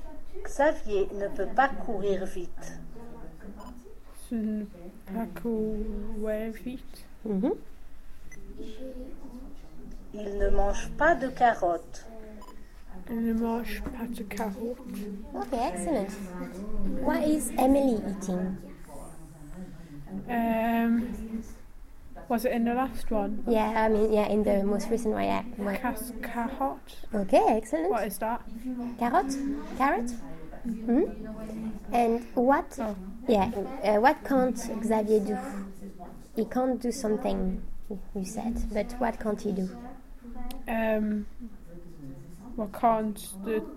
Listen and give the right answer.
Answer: Run.